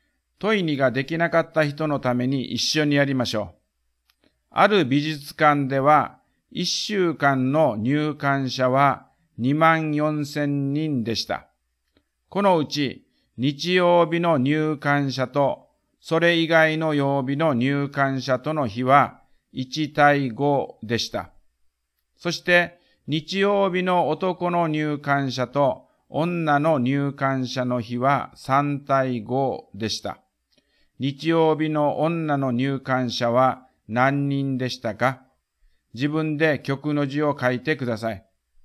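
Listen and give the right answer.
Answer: 2500人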